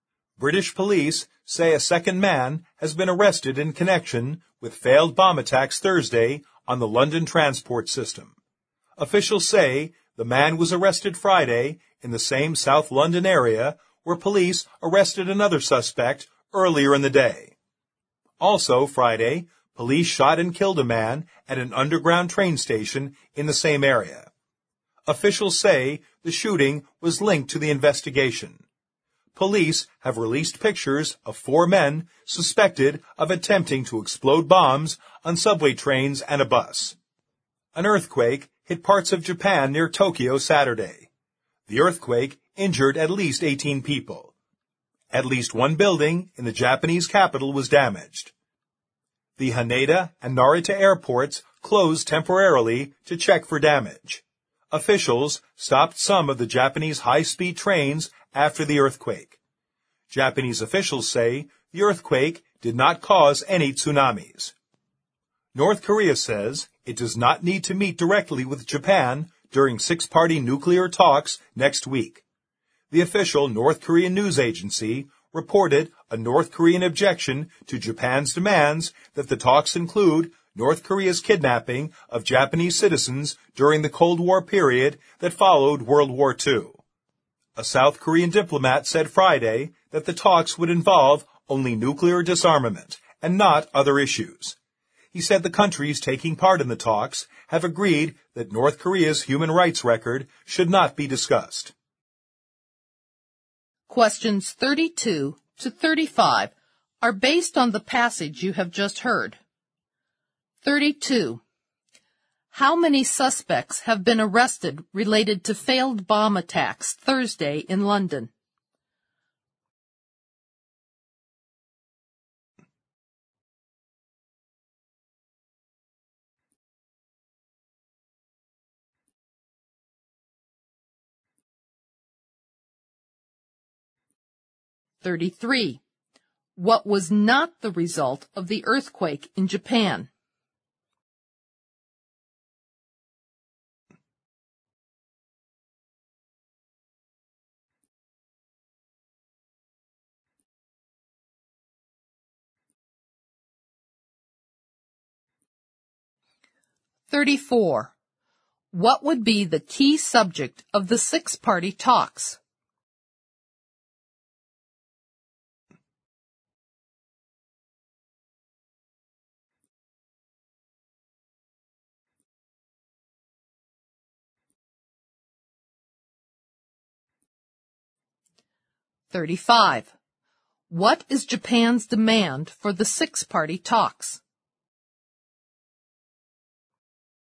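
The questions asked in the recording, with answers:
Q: How many suspects have been arrested related to failed bomb attacks Thursday in London?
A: Two

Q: What would be the key subject of the six-party talks?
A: Nuclear disarmament

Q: What is Japan's demand for the six-party talks?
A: That the talks include North Korea's kidnapping of Japanese citizens during the Cold War period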